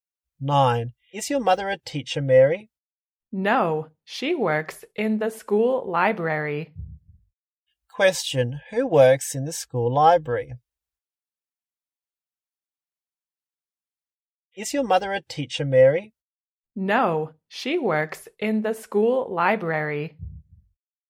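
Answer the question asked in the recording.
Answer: Mary's mother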